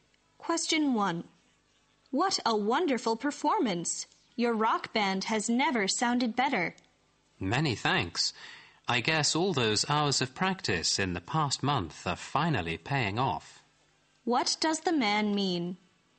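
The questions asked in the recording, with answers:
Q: What does the man mean?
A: The band's many hours of practice over the past month have finally paid off.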